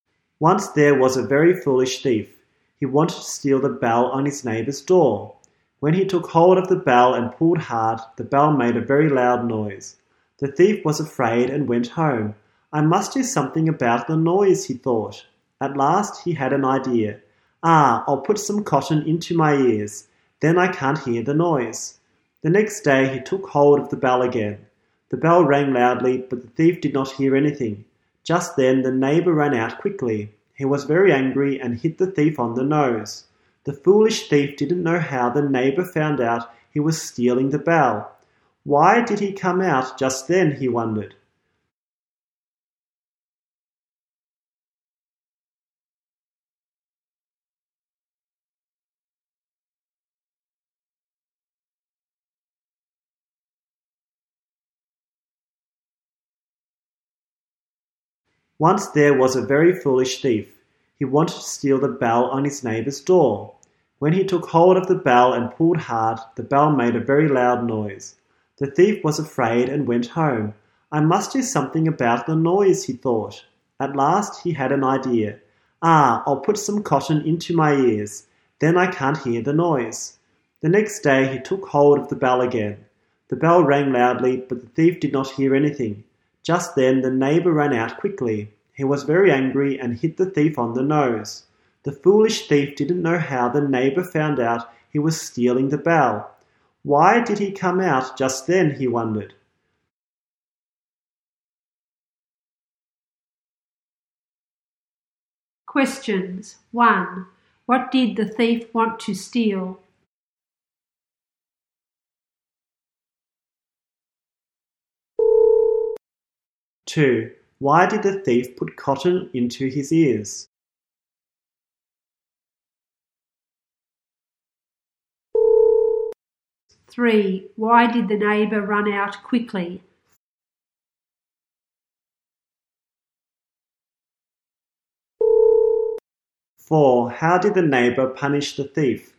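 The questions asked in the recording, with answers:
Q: What did the thief want to steal?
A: The bell on his neighbor's door

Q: Why did the thief put cotton into his ears?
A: So he couldn't hear the noise of the bell

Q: How did the neighbor punish the thief?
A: He hit the thief on the nose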